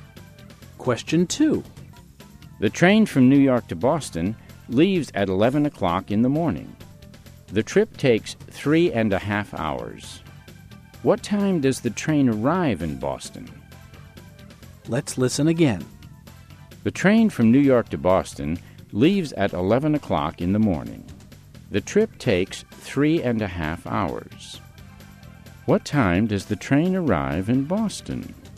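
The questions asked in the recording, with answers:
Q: What time does the train arrive in Boston?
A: 2:30 in the afternoon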